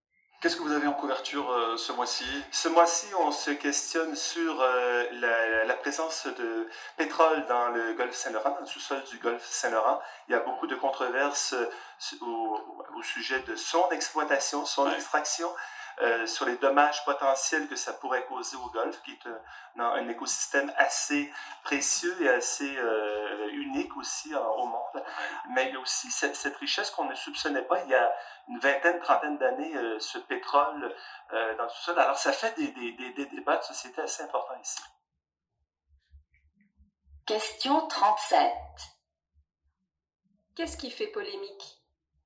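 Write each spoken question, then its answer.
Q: Qu'est-ce qui fait polémique?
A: L'exploitation du pétrole dans le sous-sol du golfe Saint-Laurent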